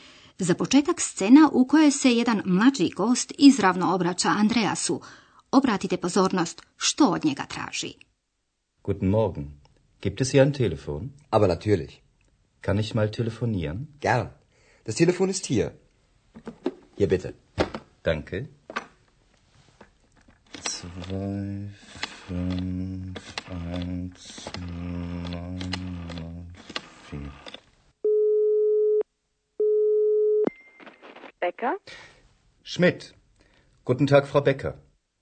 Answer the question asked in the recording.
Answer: Vjerujemo da ste uspjeli prepoznati da je mladić zatražio telefon.